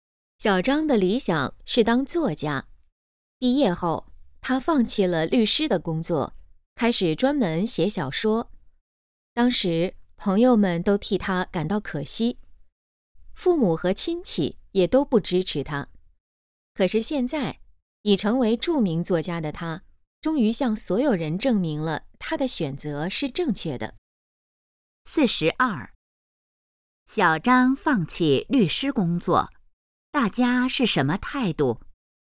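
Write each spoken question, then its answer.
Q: 小张放弃律师工作,大家是什么态度?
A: 觉得可惜,不支持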